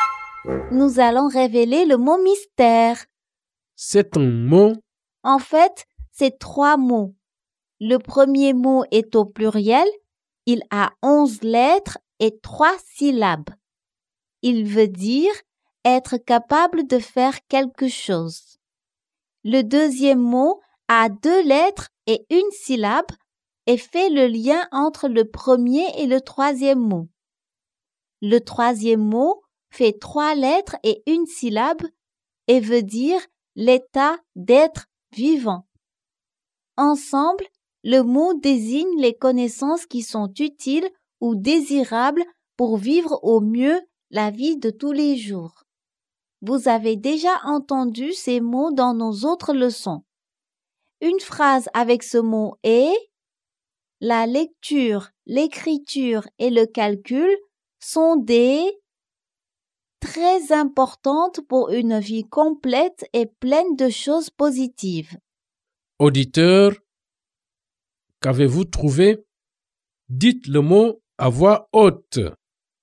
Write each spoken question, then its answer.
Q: Auditeur, qu'avez-vous trouvé?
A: Le mot mystère est compétence de vie.